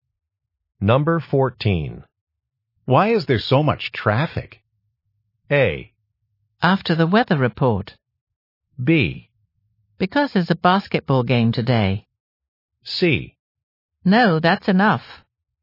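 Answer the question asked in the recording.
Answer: B: Because there's a basketball game today.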